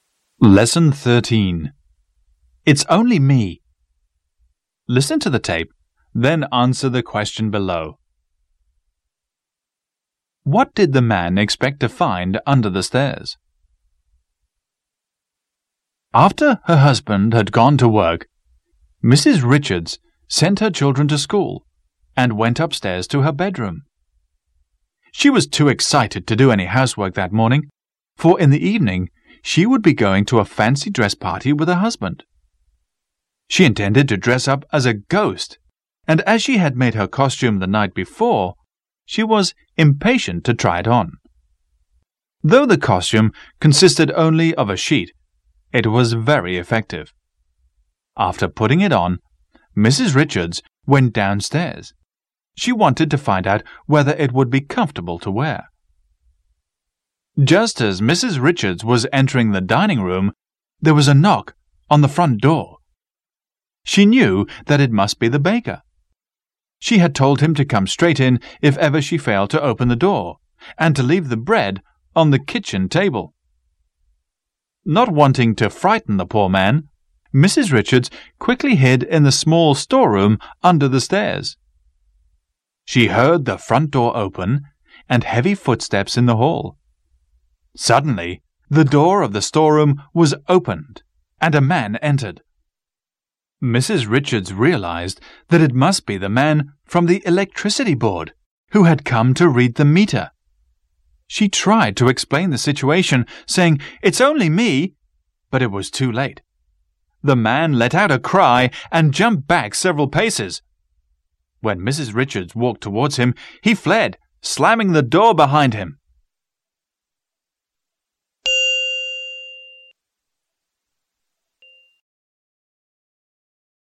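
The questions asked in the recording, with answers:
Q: What did the man expect to find under the stairs?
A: The electricity meter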